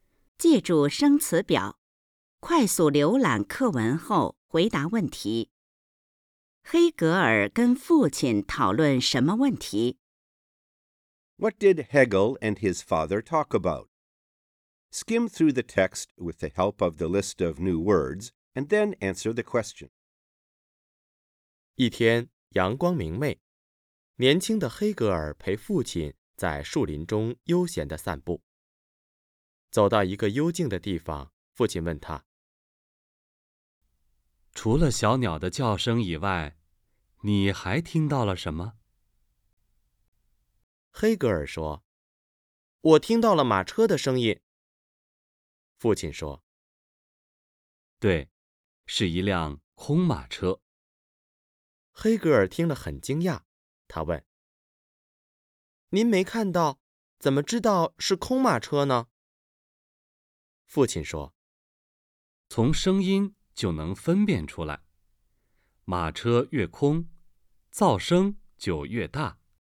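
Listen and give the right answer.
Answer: 听到的马车声音,怎么知道是空马车(马车越空,噪声越大)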